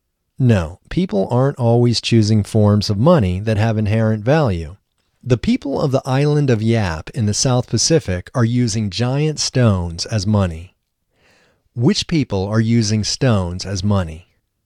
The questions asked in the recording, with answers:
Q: Which people are using stones as money?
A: The people of the island of Yap in the South Pacific are using stones as money.